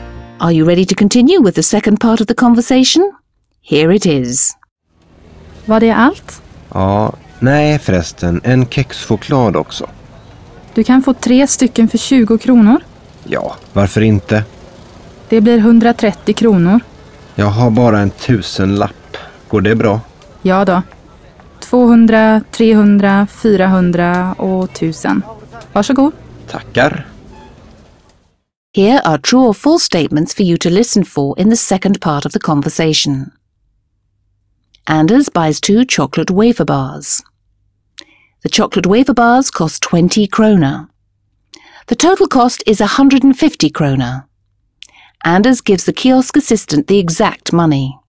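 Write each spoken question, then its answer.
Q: Anders buys 2 chocolate wafer bars.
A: False

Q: The total cost is 150 kroner.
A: False

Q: Anders gives the kiosk assistant the exact money.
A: False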